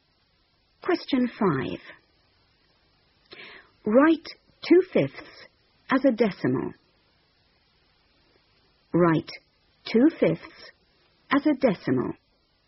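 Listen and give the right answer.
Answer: 0.4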